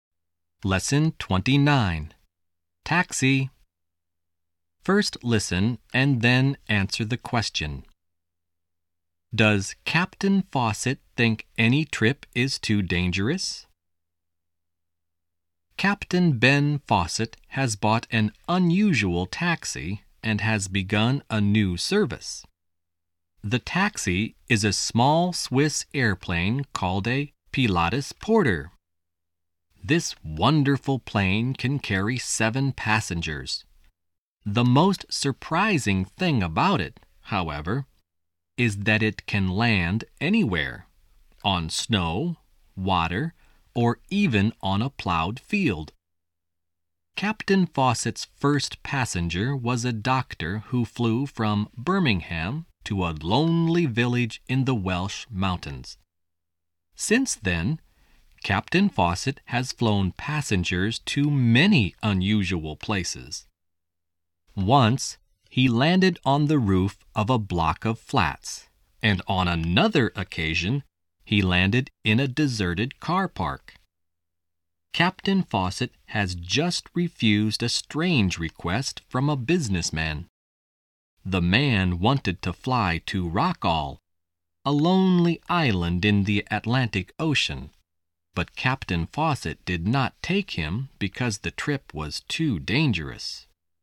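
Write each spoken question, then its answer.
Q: Does Captain Fawcett think any trip is too dangerous?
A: Yes, he refused to fly a businessman to Rockall because the trip was too dangerous.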